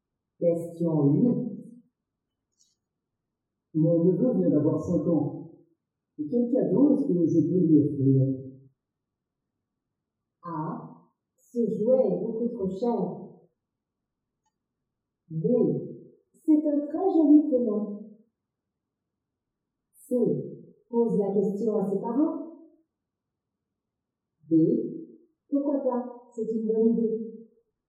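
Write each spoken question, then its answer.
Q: Et quel cadeau est-ce que je peux lui offrir?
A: C: Pose la question à ses parents.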